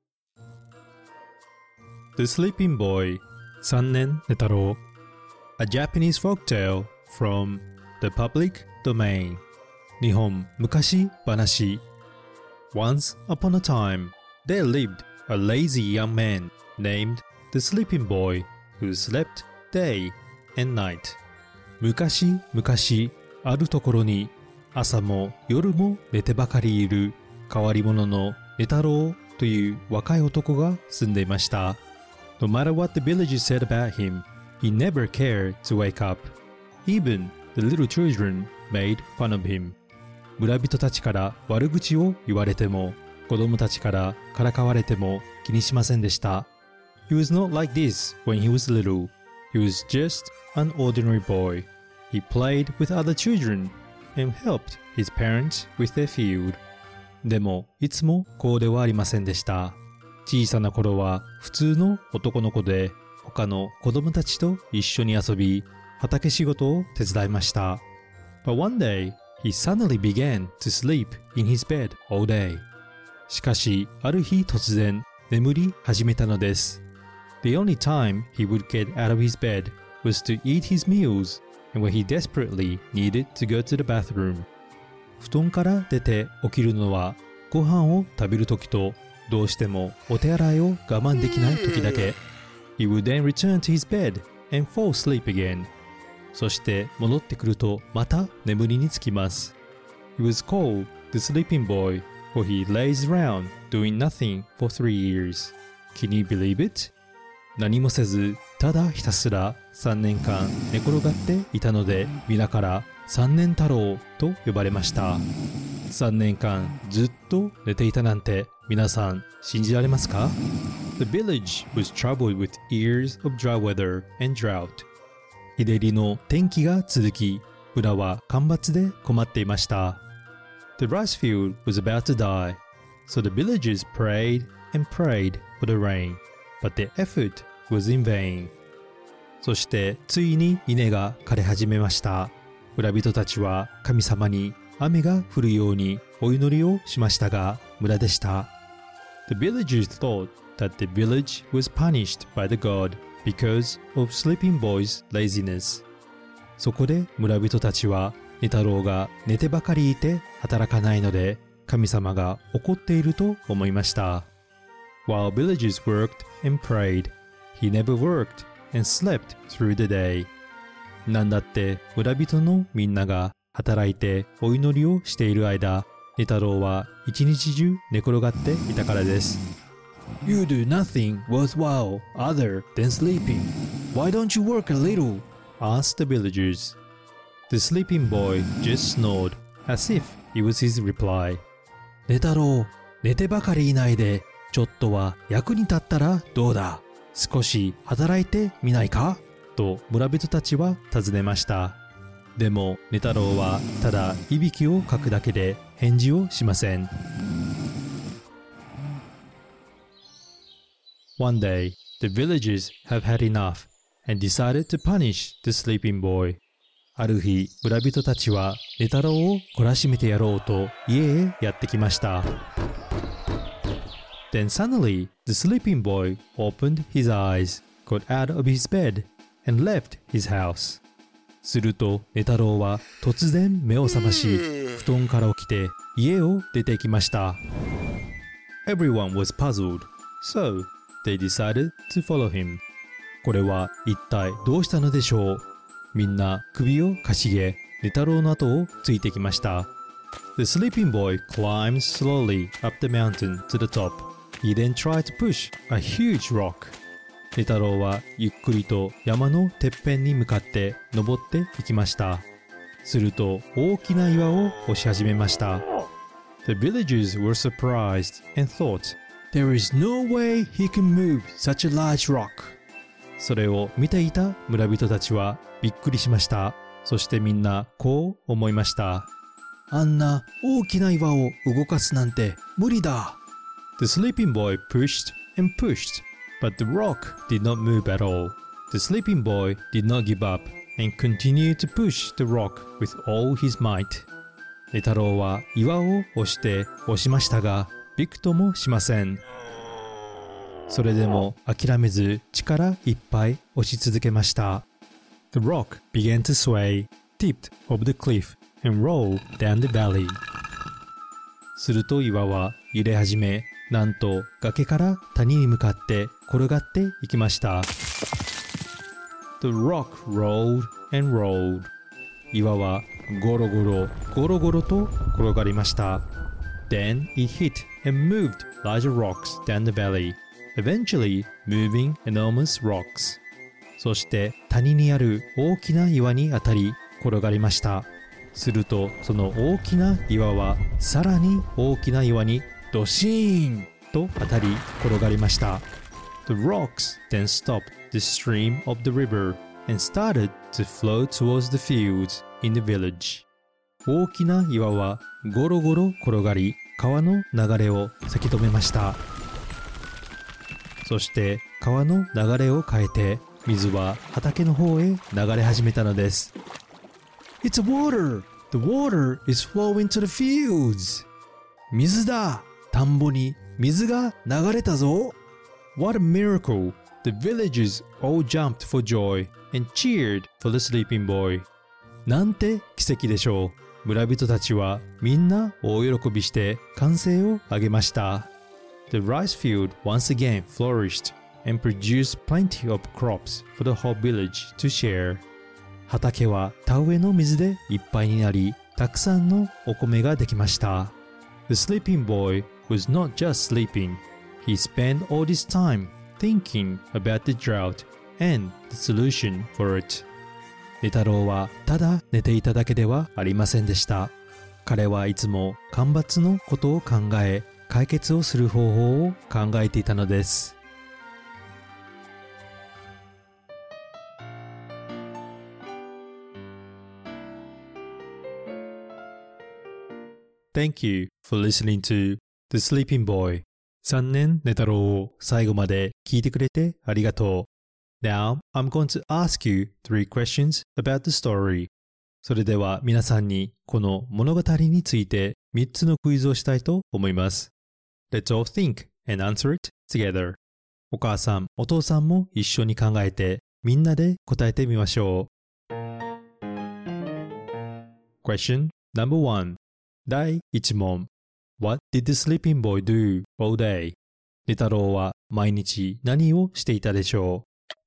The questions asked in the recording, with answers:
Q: What did the sleeping boy do all day?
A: He was sleeping day and night